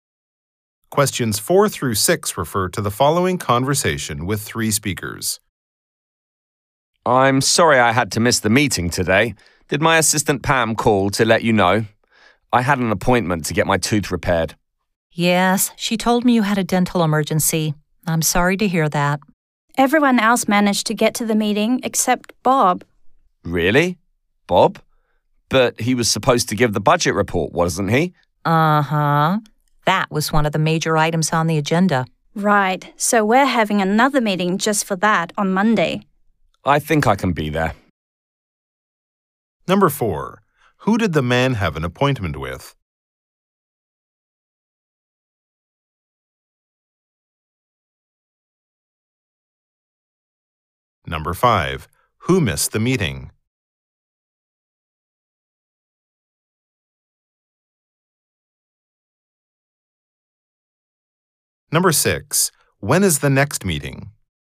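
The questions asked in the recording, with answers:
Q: Who did the man have an appointment with?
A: A dentist

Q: Who missed the meeting?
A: Bob

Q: When is the next meeting?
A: Monday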